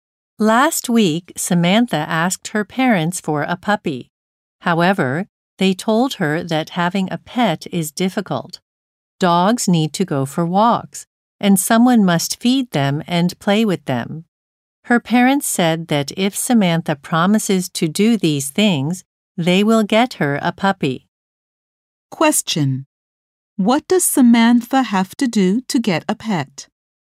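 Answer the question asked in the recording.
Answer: Promise to walk, feed, and play with the dog.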